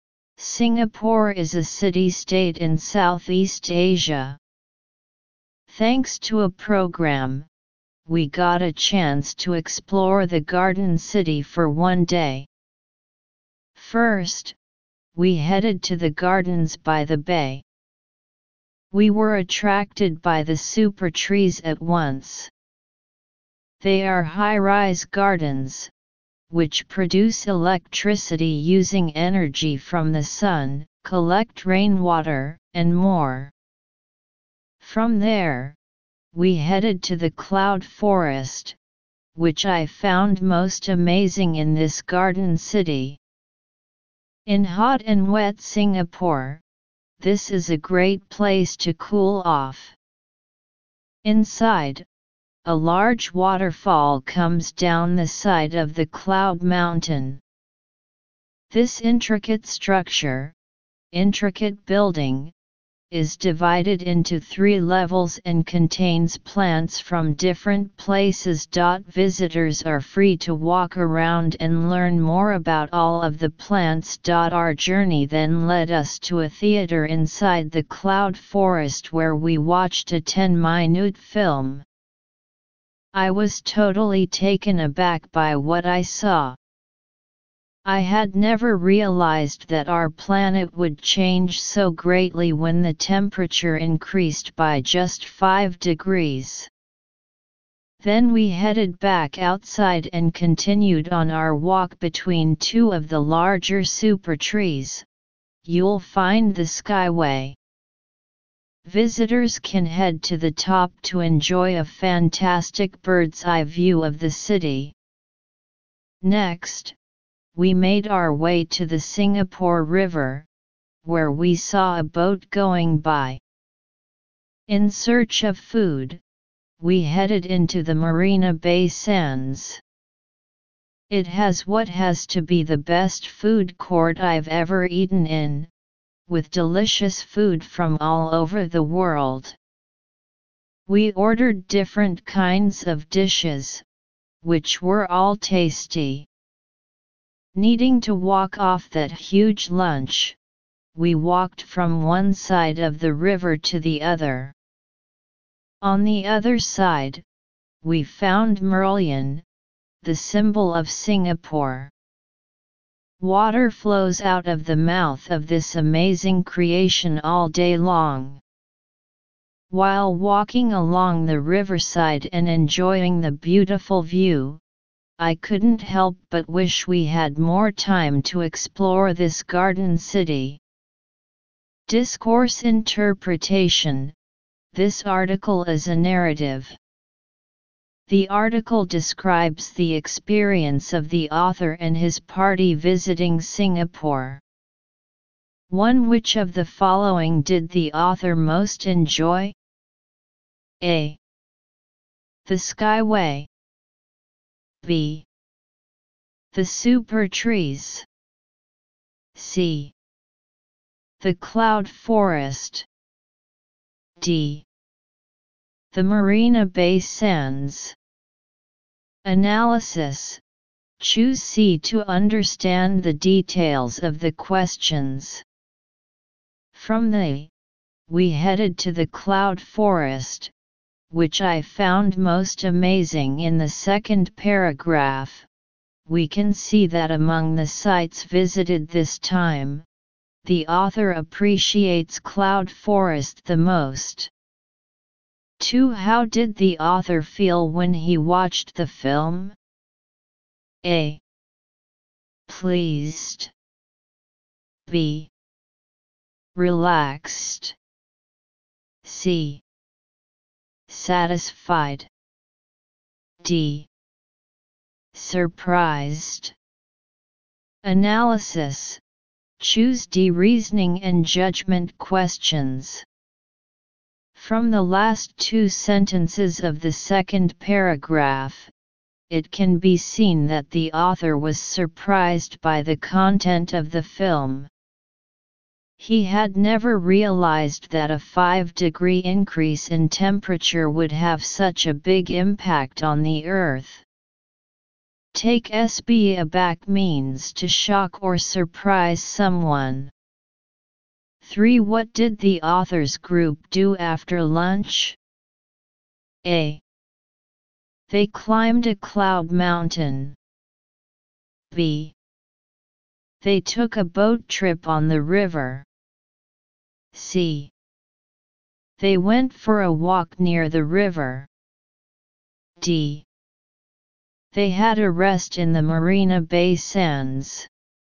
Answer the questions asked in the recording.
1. Choose C
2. Choose D.
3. Choose C